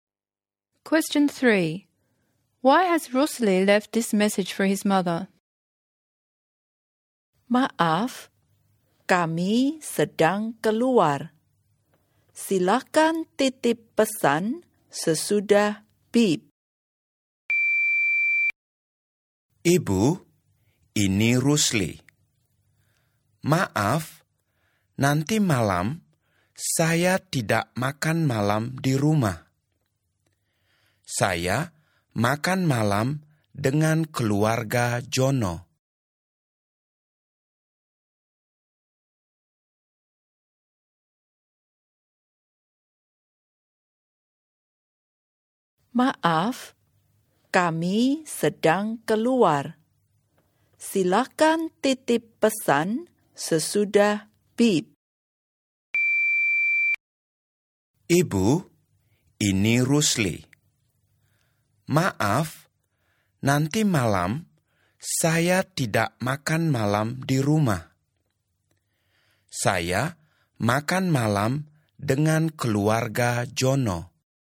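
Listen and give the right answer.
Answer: To say she won't be home for dinner tonight because she is having dinner with Jono's family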